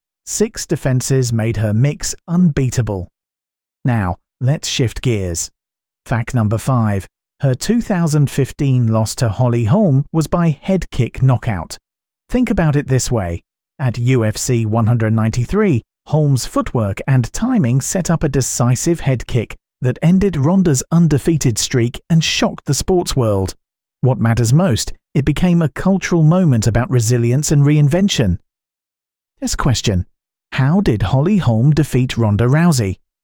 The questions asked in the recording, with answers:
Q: How did Holly Holm defeat Ronda Rousey?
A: Correct answer, head kick knockout.